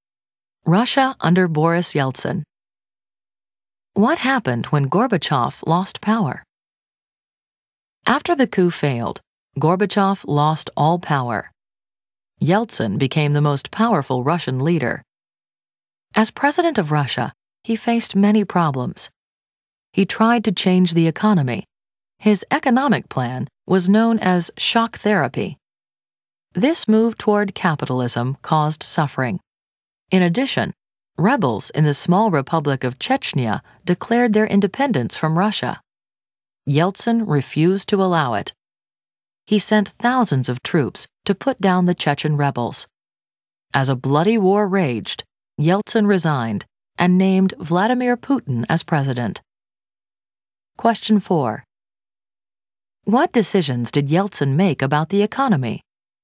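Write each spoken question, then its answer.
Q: What decisions did Yeltsin make about the economy?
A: He moved toward capitalism with an economic plan called shock therapy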